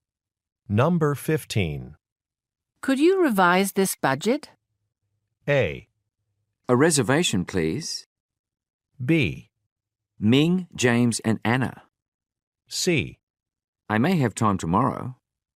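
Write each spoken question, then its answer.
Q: Could you revise this budget?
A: C: I may have time tomorrow.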